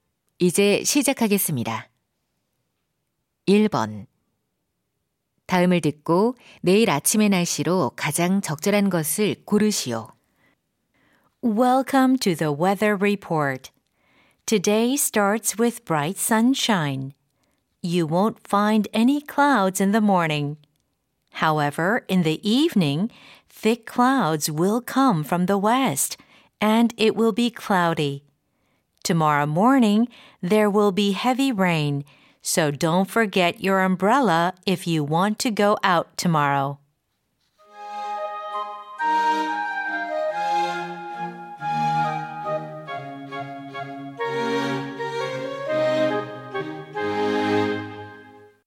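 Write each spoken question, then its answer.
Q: 다음을 듣고 내일 아침의 날씨로 가장 적절한 것을 고르시오.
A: 비가 많이 옴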